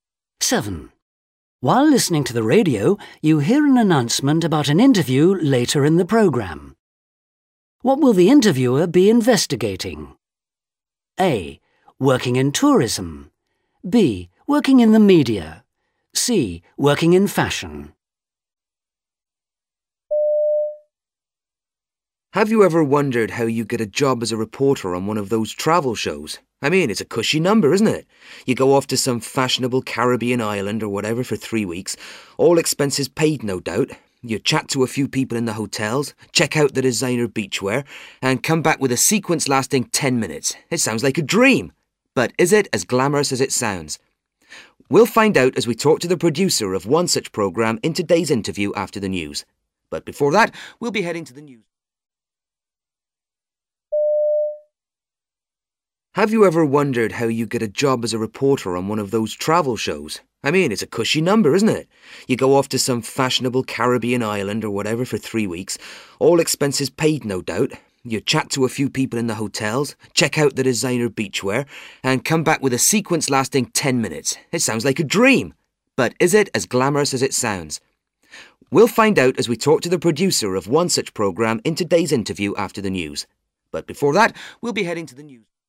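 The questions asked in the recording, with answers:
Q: What will the interviewer be investigating?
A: B: Working in the media.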